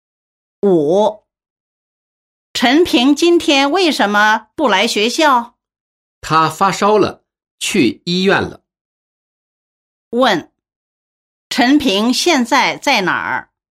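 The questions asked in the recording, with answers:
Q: 问,陈平现在在哪儿?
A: 在医院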